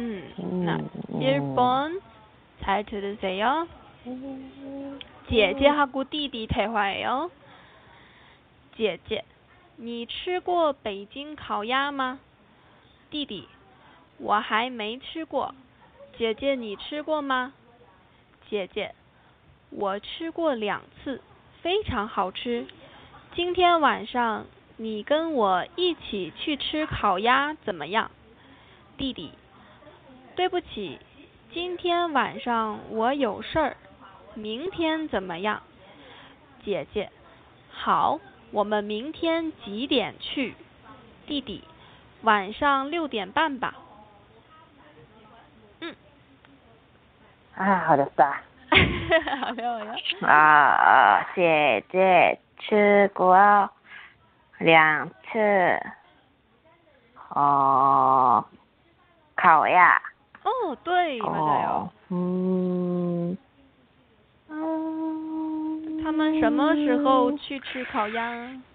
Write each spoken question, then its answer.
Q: 他们什么时候去吃烤鸭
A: 跟明天晚上